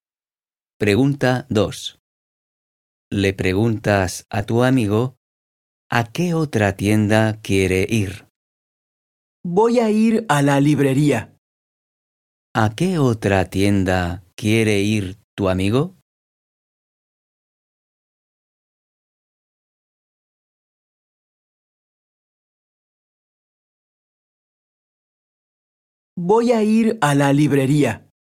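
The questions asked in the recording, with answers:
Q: ¿A qué otra tienda quiere ir tu amigo?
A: a la librería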